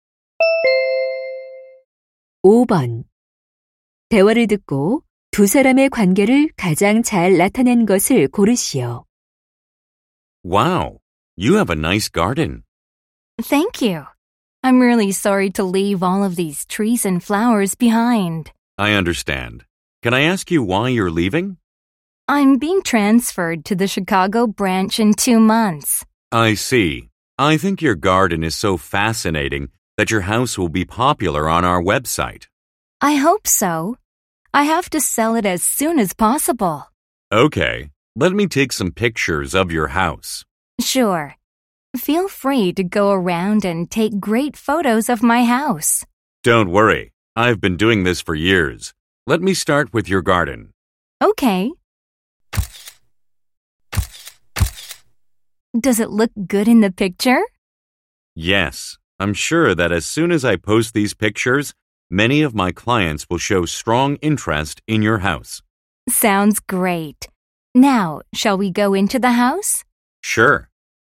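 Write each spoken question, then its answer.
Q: 대화를 듣고 두 사람의 관계를 가장 잘 나타낸 것을 고르시오.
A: 부동산 중개인 - 집주인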